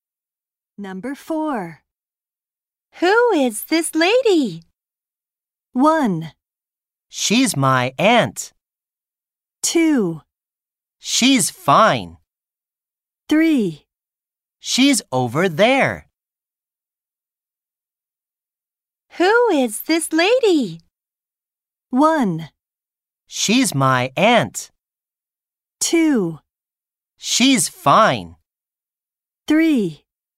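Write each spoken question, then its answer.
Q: Who is this lady?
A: 1: She's my aunt.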